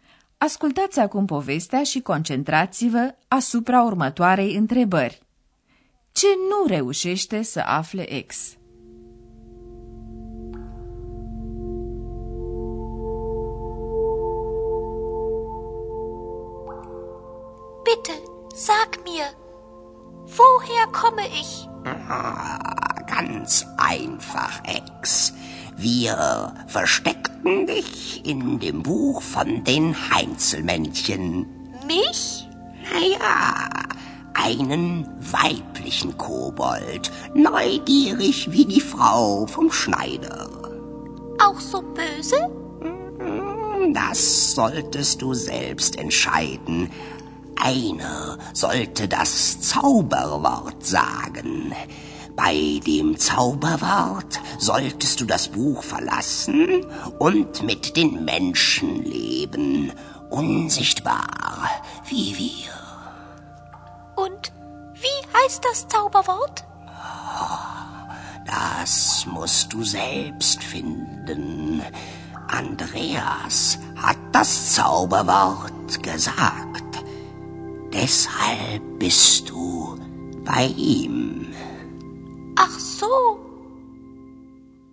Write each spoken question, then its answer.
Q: Ce nu reușește să afle ex?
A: Ea nu află însă care e acest cuvânt.